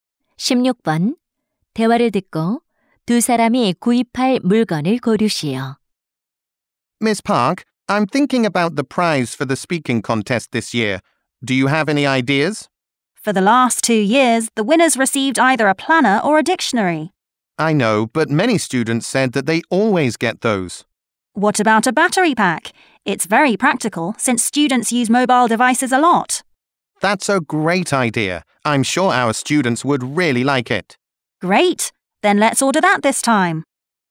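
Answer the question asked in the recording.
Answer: 보조 배터리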